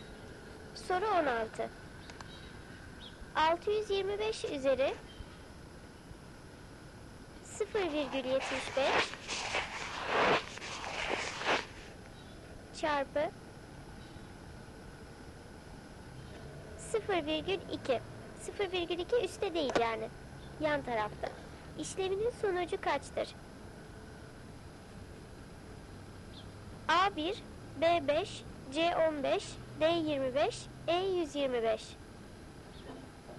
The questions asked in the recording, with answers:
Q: Yan tarafta. İşleminin sonucu kaçtır?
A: Doğru cevap D 25.